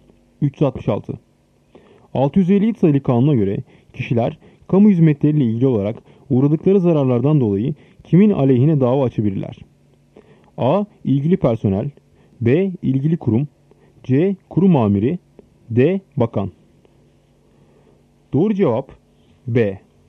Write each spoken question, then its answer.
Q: 657 sayılı kanuna göre kişiler kamu hizmetleriyle ilgili olarak uğradıkları zararlardan dolayı kimin aleyhine dava açabilirler?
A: Doğru cevap B. İlgili kurum.